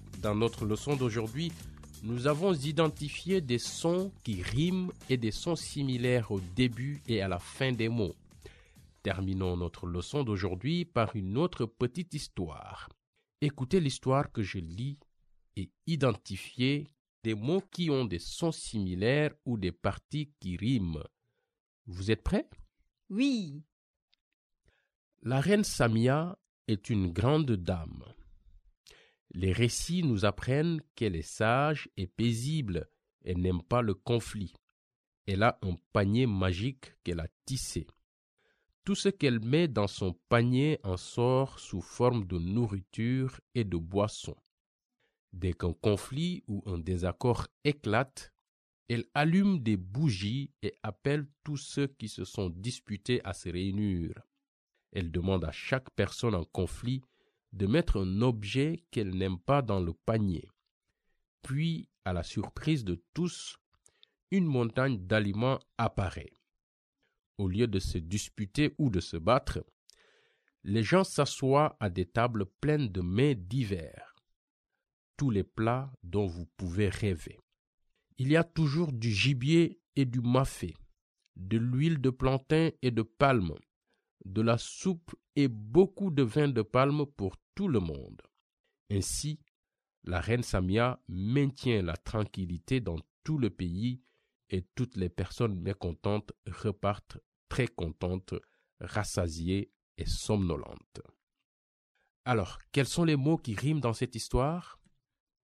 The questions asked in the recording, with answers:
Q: Alors, quels sont les mots qui riment dans cette histoire?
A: Contente et somnolente? Et récit et conflit?